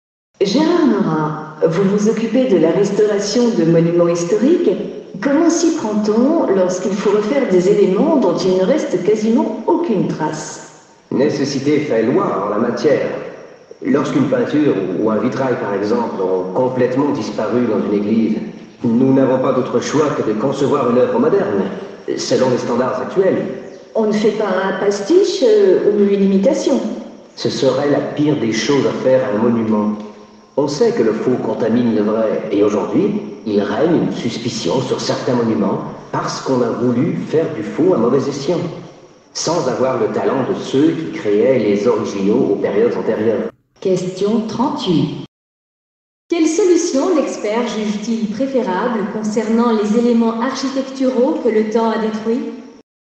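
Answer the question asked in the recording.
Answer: Concevoir une œuvre moderne selon les standards actuels, sans pastiche ni imitation.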